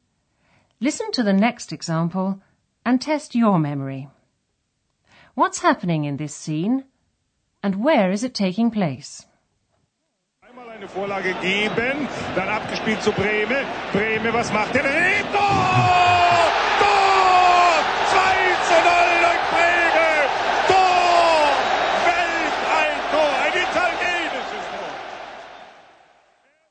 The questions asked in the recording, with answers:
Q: What's happening in this scene and where is it taking place?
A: that was an excerpt from a football commentary